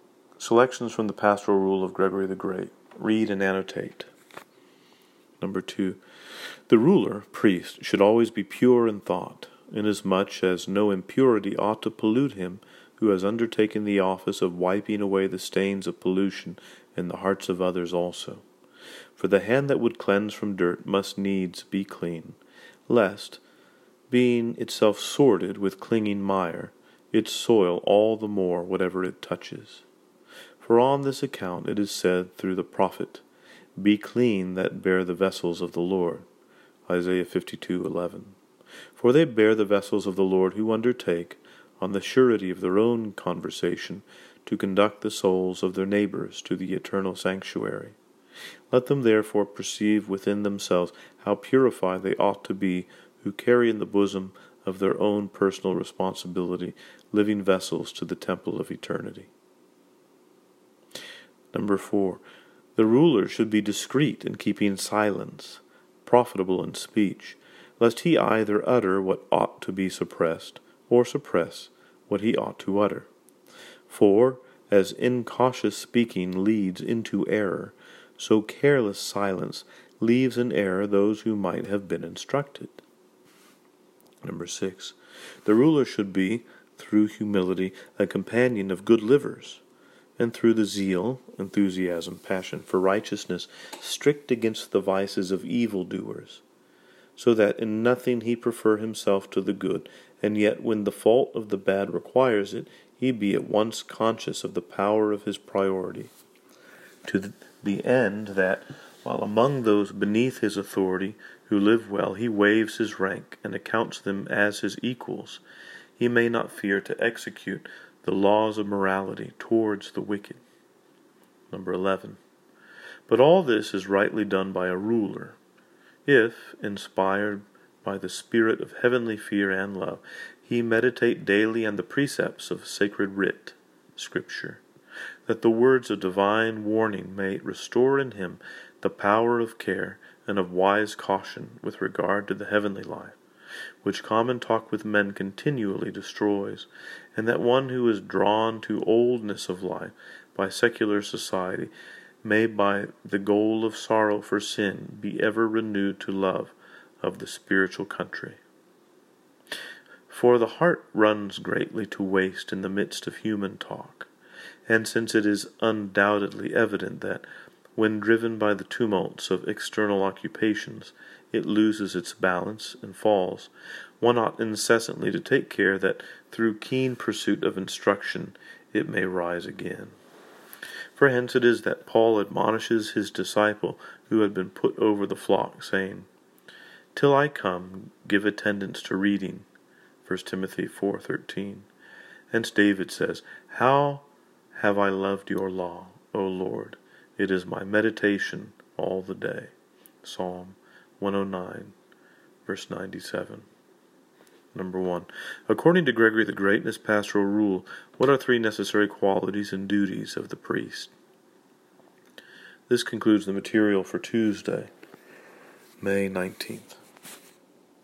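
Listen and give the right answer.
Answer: Be pure in thought; be discreet in silence and profitable in speech; be humble with the good but strict against evildoers; meditate daily on Scripture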